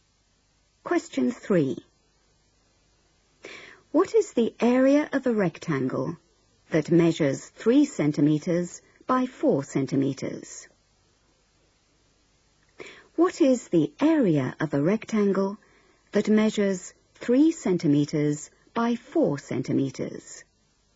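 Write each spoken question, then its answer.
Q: What is the area of a rectangle that measures 3 centimeters by 4 centimeters?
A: 12 square centimeters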